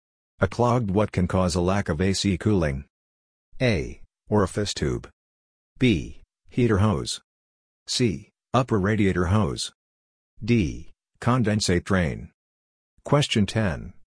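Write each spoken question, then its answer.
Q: A clogged what can cause a lack of AC cooling?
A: A: Orifice tube.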